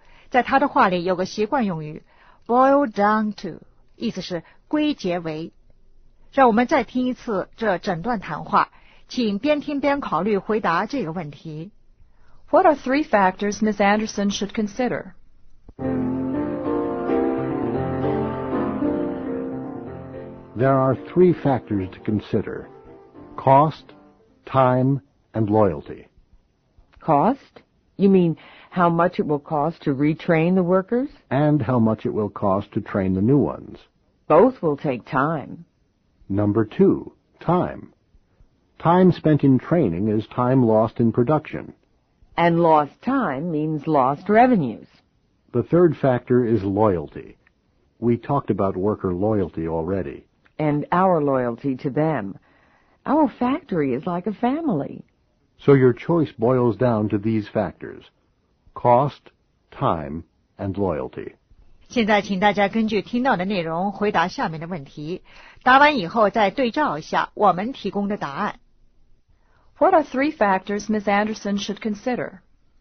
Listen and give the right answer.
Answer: Cost, time, and loyalty.